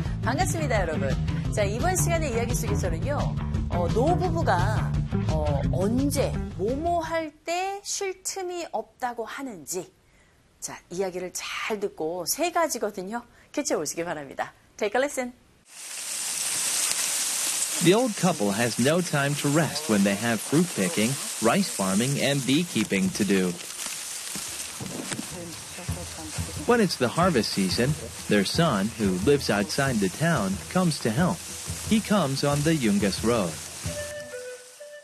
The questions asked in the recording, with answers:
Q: 노부부가, 언제, 뭐뭐 할 때 쉴 틈이 없다고 하는지.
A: 첫 번째는 과일을 딸 때, 두 번째는 벼농사 할 때, 그리고 세 번째는 양봉을 해야 할 때, 그럴 때 쉴 틈이 없다고 하죠.